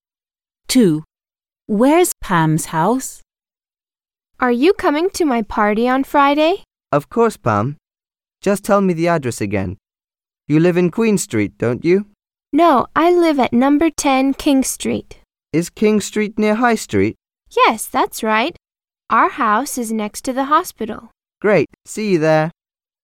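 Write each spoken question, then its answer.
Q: Where's Pam's house?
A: number 10 King Street, next to the hospital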